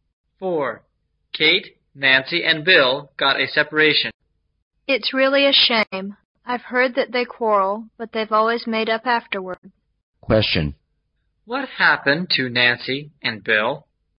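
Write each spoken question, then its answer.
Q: What happened to Nancy and Bill?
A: They separated.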